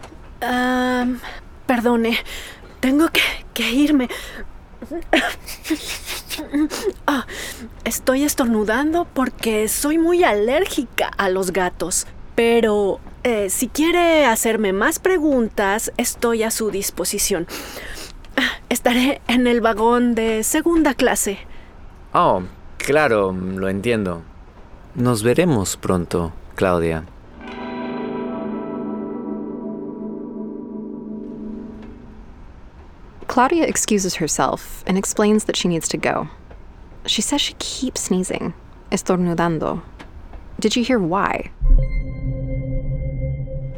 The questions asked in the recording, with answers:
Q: Did you hear why?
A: Because she is muy alérgica a los gatos, very allergic to cats.